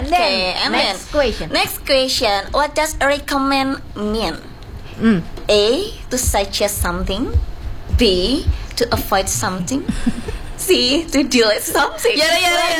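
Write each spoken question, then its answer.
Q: What does recommend mean?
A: A: To suggest something.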